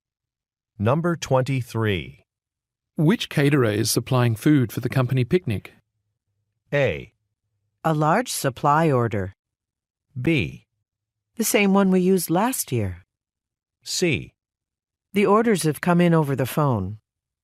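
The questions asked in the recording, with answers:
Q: Which caterer is supplying food for the company picnic?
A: B: The same one we used last year.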